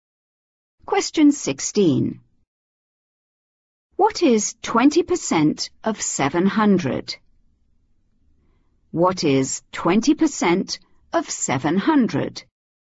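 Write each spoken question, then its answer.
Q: What is 20% of 700?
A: 140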